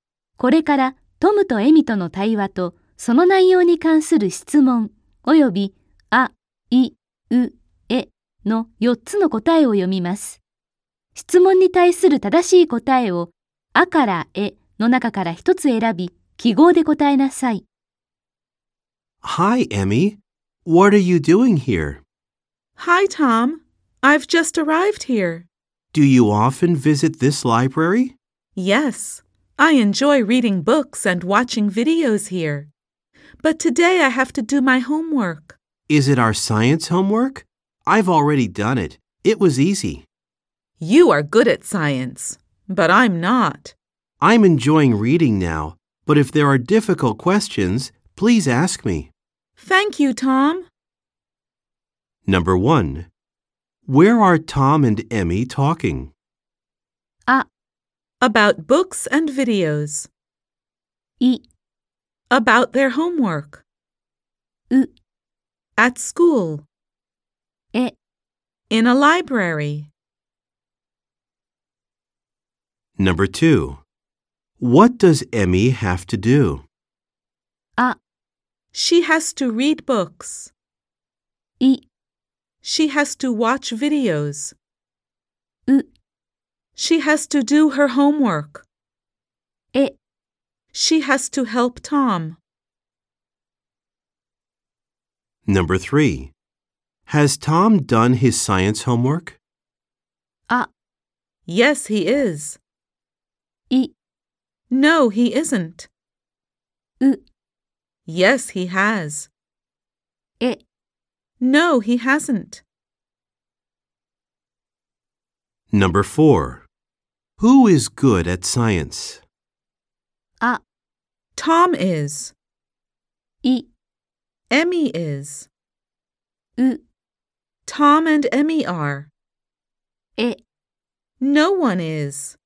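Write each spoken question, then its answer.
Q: Where are Tom and Emmy talking?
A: え: In a library.

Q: What does Emmy have to do?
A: う: She has to do her homework.

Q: Has Tom done his science homework?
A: う: Yes, he has.

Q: Who is good at science?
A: あ: Tom is.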